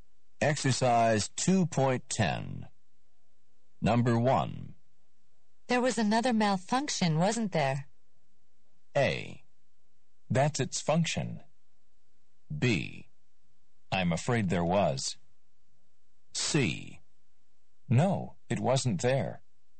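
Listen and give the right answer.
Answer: B: I'm afraid there was.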